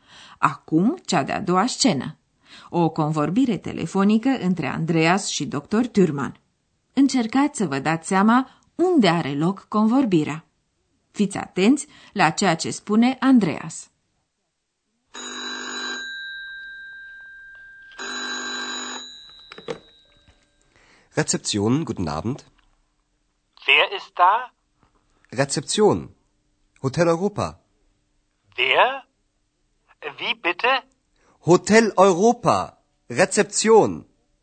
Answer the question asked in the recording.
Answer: Hotelul Europa îl cunoașteți deja, iar Andreas cheamă recepția.